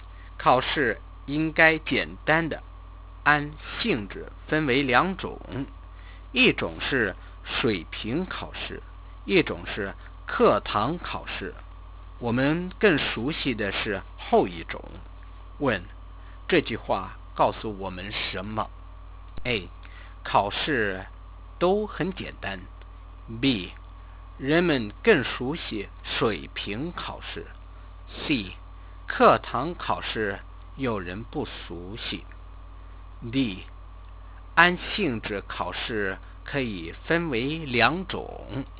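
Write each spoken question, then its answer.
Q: 这句话告诉我们什么?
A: D: 按性质考试可以分为两种。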